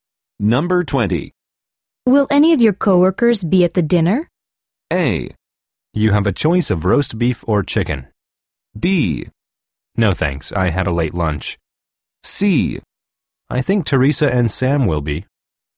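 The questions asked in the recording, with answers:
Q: Will any of your coworkers be at the dinner?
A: C: I think Teresa and Sam will be.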